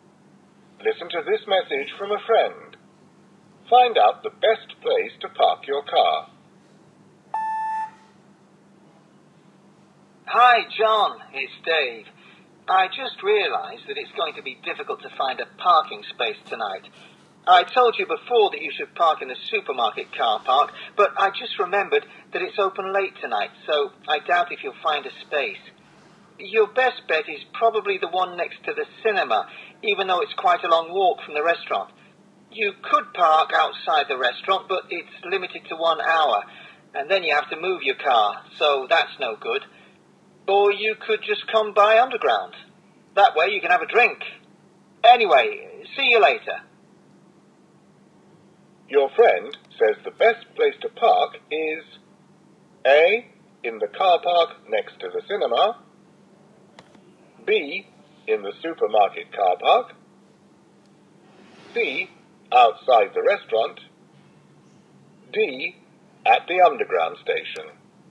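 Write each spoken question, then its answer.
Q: Your friend says the best place to park is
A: A: In the car park next to the cinema.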